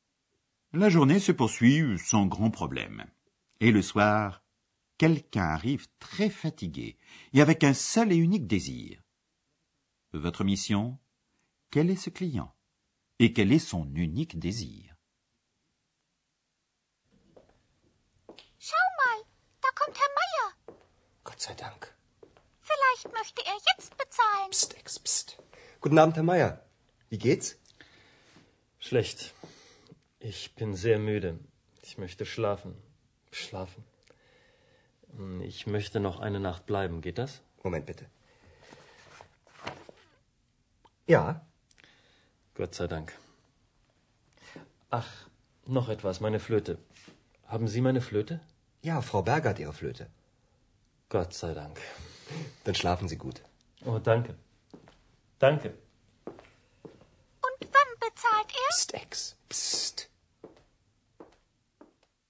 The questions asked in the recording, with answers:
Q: Quel est ce client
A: Il s'agit bien de Monsieur Mayer

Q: Et quel est son unique désir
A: qui n'a qu'un désir, pouvoir dormir